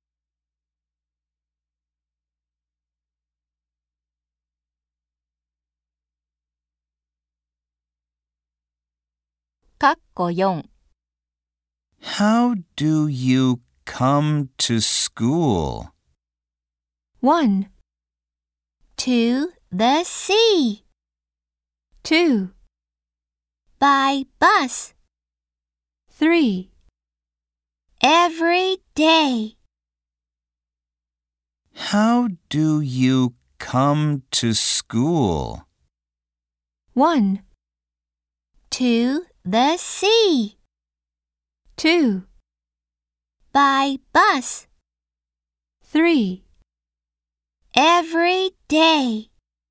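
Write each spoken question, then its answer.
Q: How do you come to school?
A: 2: By bus.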